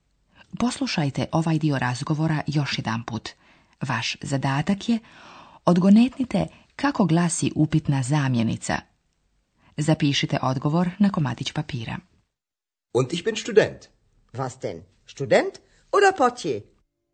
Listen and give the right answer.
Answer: odgovor je vas.